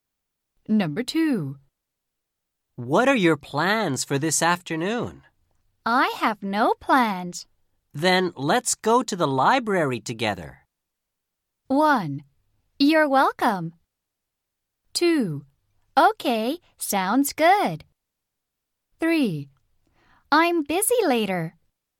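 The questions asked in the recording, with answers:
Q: Then let's go to the library together.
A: 2: Okay, sounds good.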